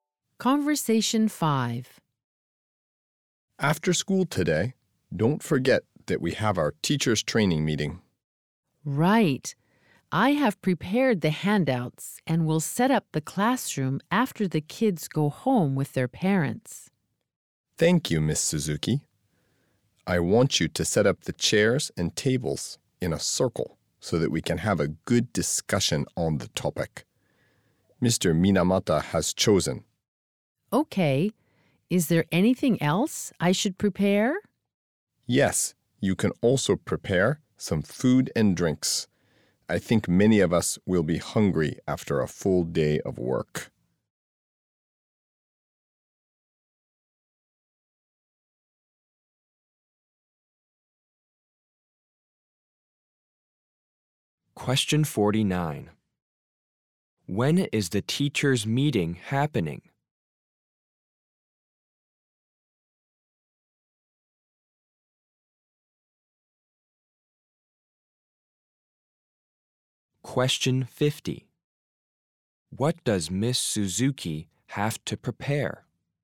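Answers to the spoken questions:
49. After school today
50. Set up chairs and tables in a circle and prepare food and drinks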